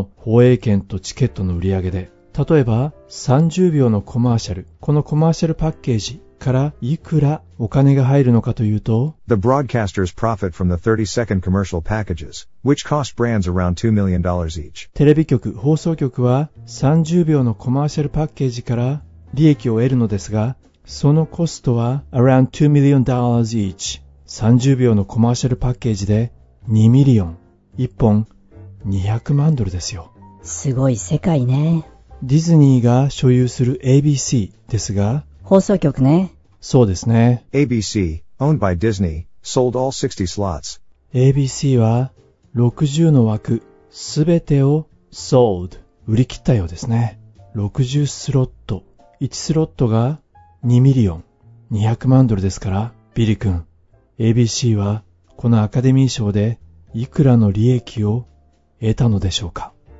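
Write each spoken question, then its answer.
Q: ABC はこのアカデミー賞でいくらの利益を得たのでしょうか。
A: 1億2000万ドル(60枠×200万ドル)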